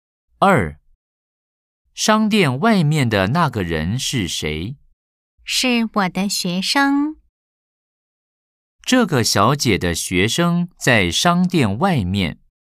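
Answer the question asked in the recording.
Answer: 对 (O)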